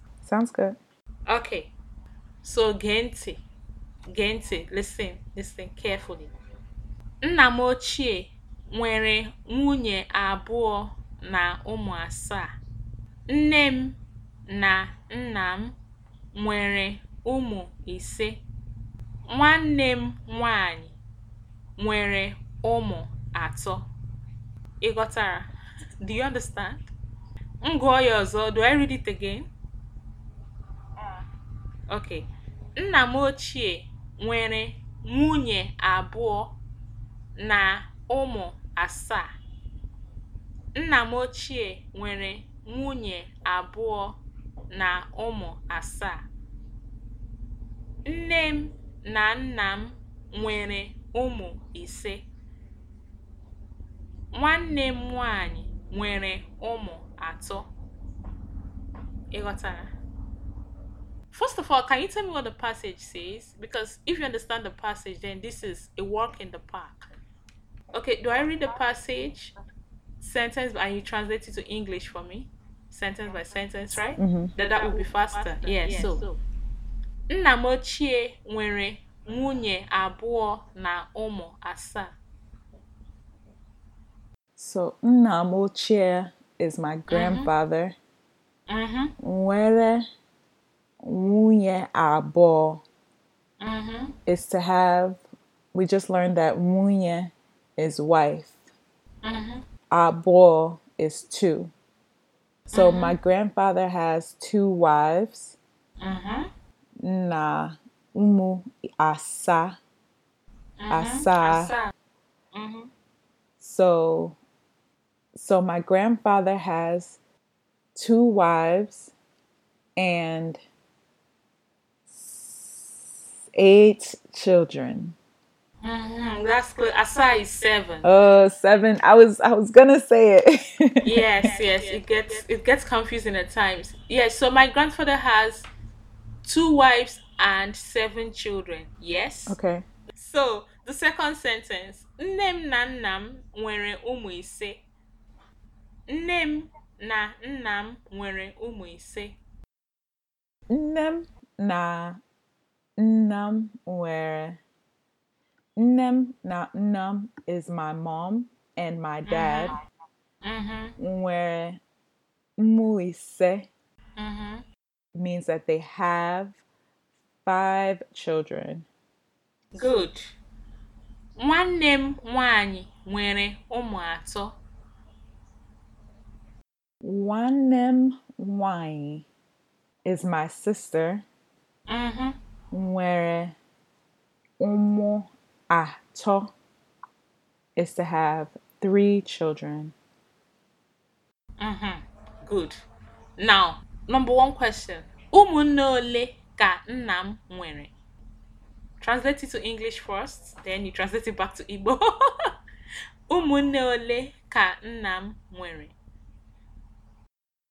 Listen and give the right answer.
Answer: Nnam nwere umune isi.